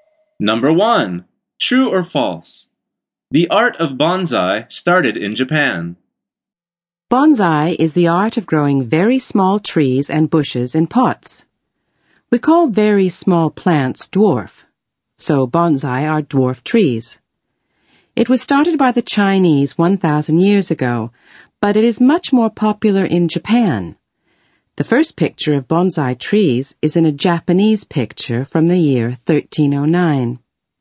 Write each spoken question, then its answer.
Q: The art of bonsai started in Japan.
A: The answer is false.